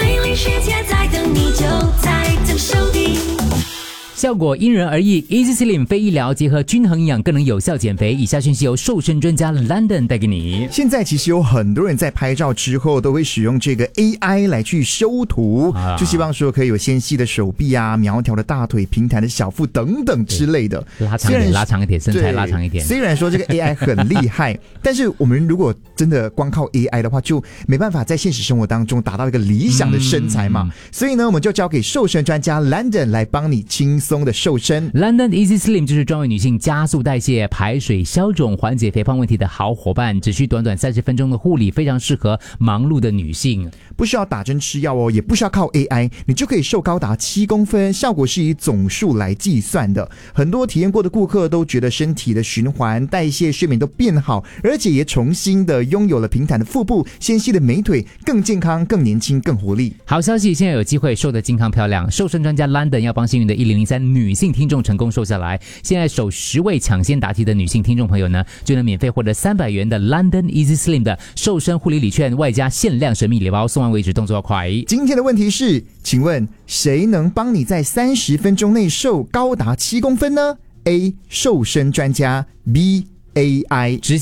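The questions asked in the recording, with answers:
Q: 今天的问题是,请问谁能帮你在30分钟内瘦高达7公分呢 ?A.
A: A: 瘦身专家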